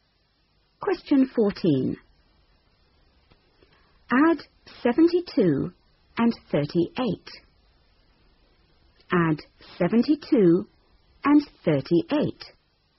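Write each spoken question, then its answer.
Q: Add 72 and 38.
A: 110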